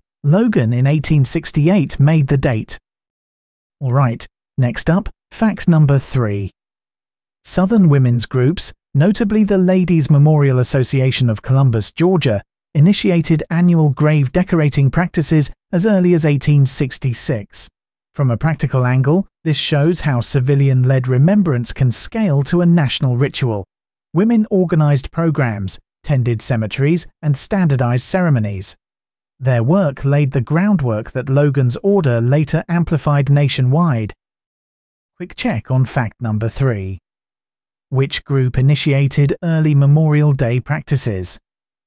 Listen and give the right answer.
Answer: the Ladies Memorial Association of Columbus, Georgia.